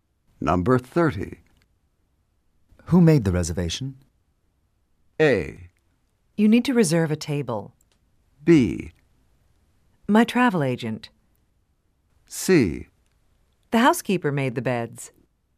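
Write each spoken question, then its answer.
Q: Who made the reservation?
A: B: My travel agent.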